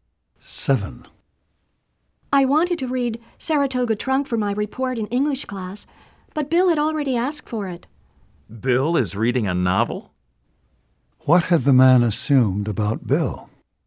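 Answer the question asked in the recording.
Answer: That Bill did not read novels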